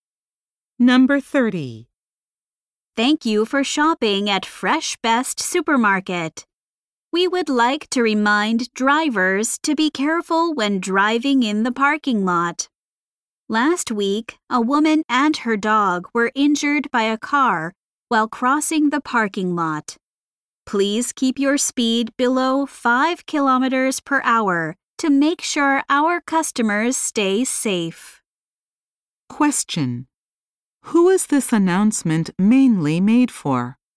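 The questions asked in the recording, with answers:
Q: Who is this announcement mainly made for?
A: Drivers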